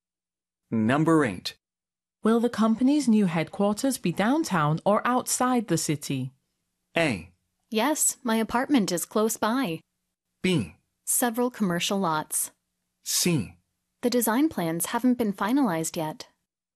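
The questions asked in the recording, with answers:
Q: Will the company's new headquarters be downtown or outside the city?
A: C: The design plans haven't been finalized yet.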